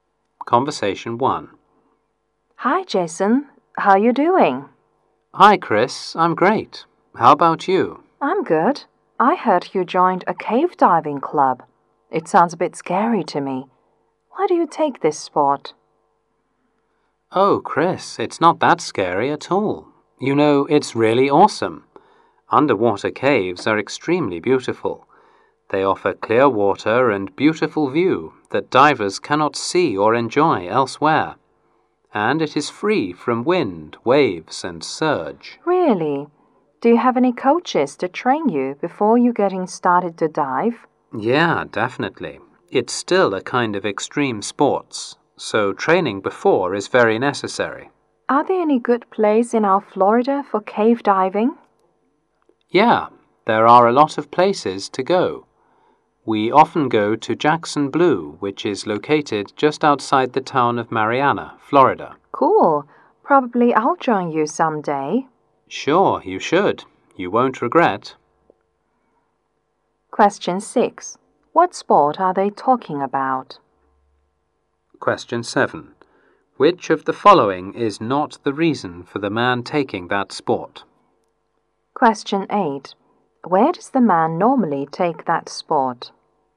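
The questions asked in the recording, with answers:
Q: What sport are they talking about?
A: Cave diving

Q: Where does the man normally take that sport?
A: At Jackson Blue, just outside Mariana, Florida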